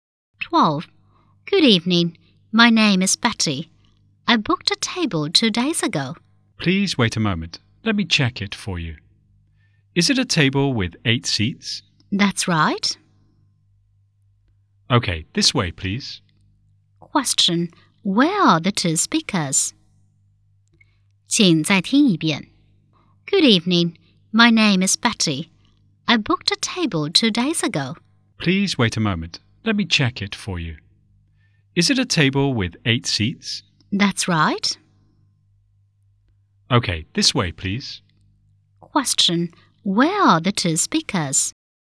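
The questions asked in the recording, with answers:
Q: where are the 2 speakers?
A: In a restaurant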